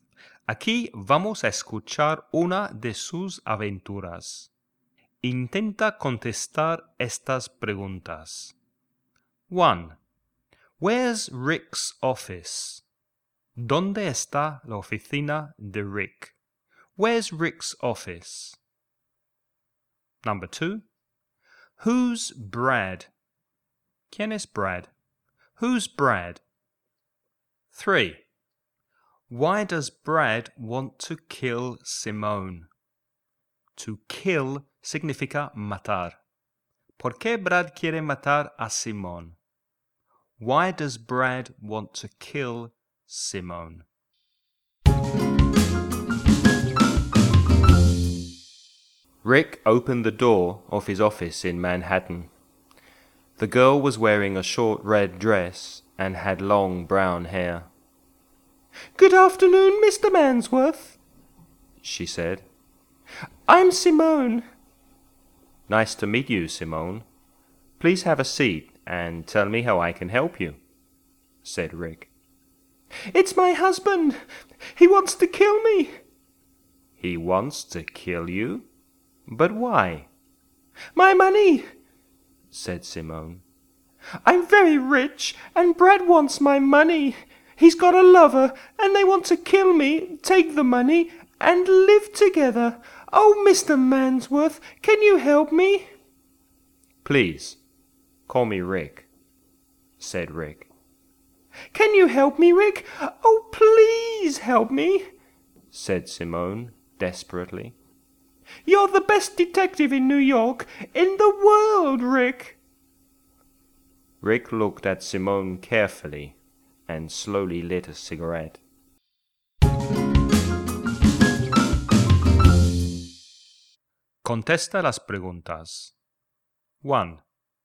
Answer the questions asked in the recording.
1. It's in Manhattan, New York.
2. Brad is Simone's husband.
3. He wants her money. He wants to live with his lover.